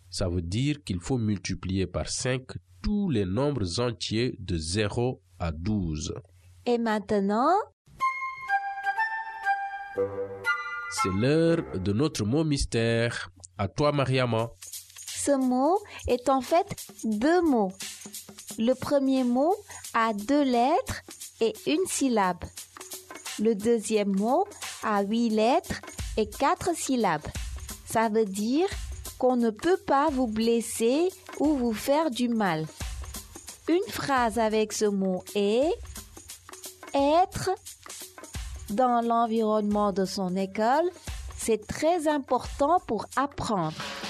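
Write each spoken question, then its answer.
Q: Ça veut dire qu'on ne peut pas vous blesser ou vous faire du mal.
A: en sécurité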